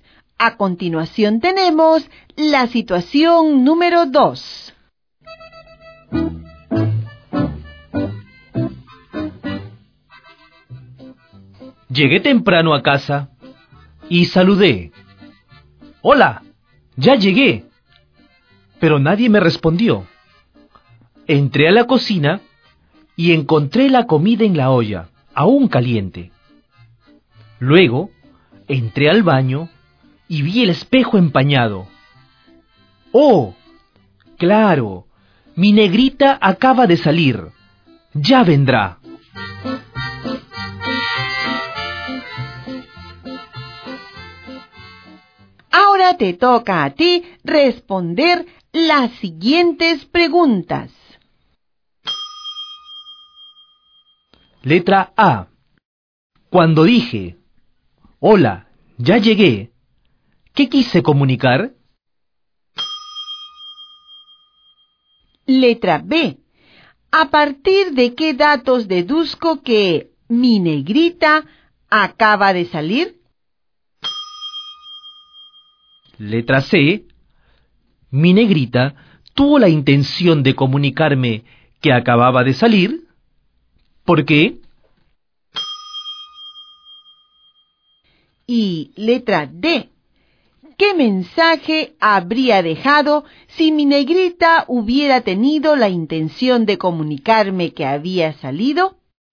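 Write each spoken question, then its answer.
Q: Cuando dije, hola, ya llegué, ¿qué quise comunicar?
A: Saludar y avisar que había llegado a casa

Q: ¿A partir de qué datos deduzco que mi negrita acaba de salir?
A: La comida aún caliente en la olla y el espejo empañado

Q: ¿Mi negrita tuvo la intención de comunicarme que acababa de salir?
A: No; esas señales no fueron dejadas con intención de comunicar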